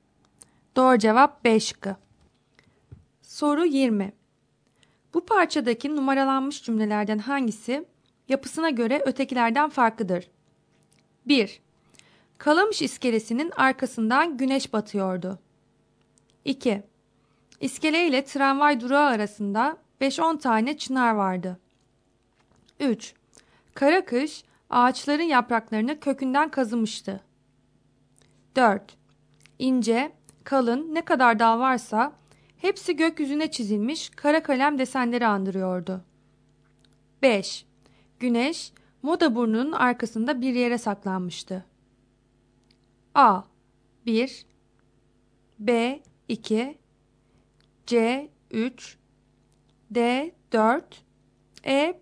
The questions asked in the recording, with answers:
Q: Bu parçadaki numaralanmış cümlelerden hangisi yapısına göre ötekilerden farklıdır?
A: Doğru cevap D şıkkı.